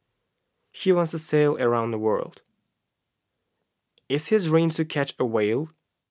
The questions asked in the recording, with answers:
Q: Is his dream to catch a whale?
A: No, his dream isn't to catch a whale.